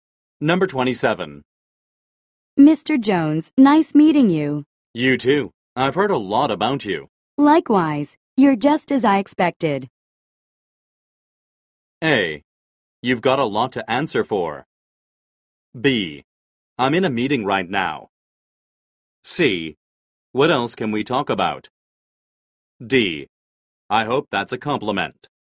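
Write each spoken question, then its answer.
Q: Likewise, you're just as I expected.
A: D: I hope that's a compliment.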